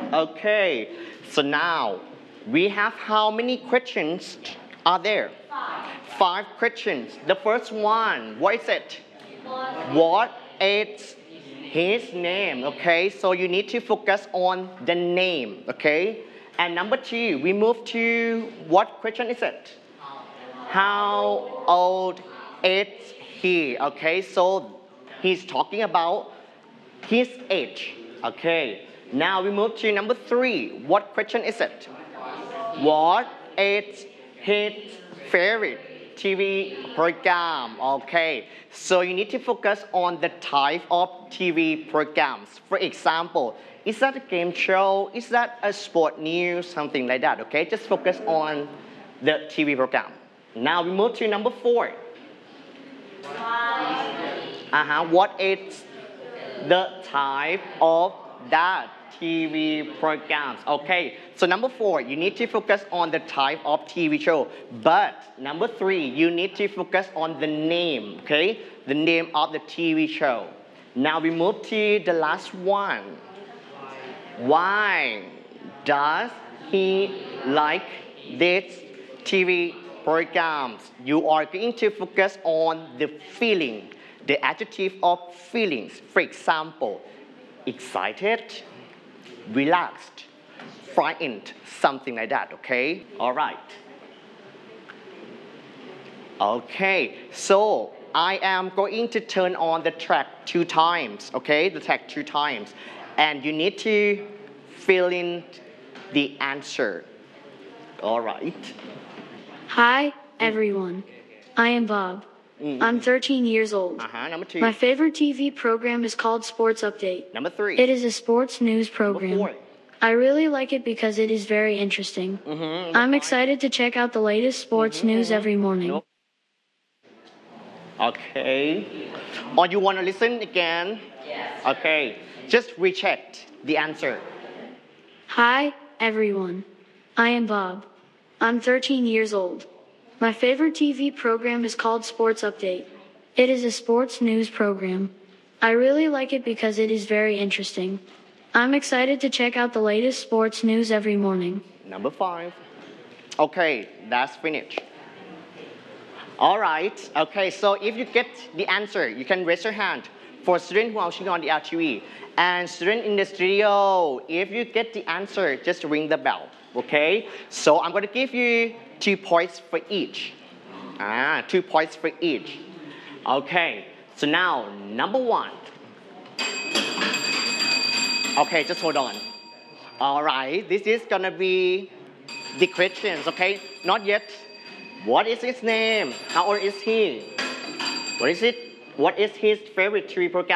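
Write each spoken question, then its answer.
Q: What is his name?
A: Bob

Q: How old is he?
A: 13 years old

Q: What is his favorite TV program?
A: Sports Update

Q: What is the type of that TV programs, okay?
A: A sports news program

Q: Why does he like this TV programs?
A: It is very interesting; he feels excited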